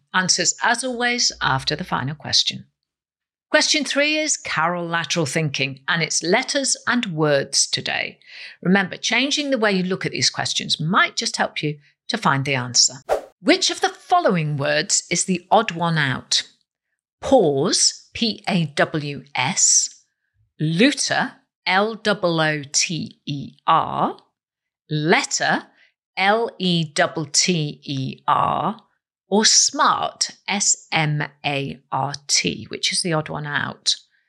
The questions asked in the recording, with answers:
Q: Which of the following words is the odd one out?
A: Well, the answer is letter